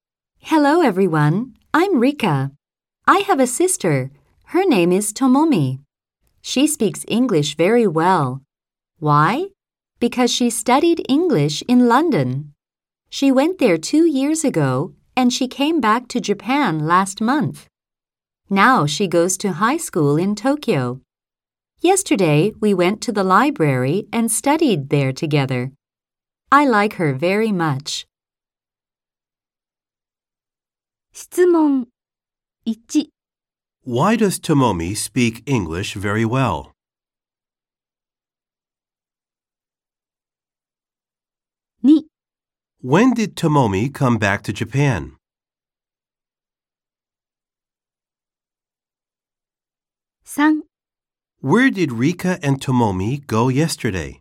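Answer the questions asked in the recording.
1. Because she studied English in London.
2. Last month.
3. To the library.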